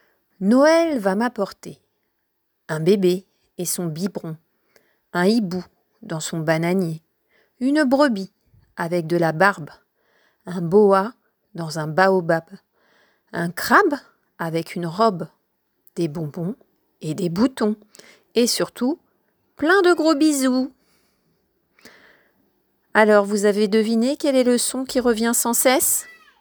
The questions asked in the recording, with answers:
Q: Alors, vous avez deviné quel est le son qui revient sans cesse?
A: Et oui, c'est le son B que fait la lettre B.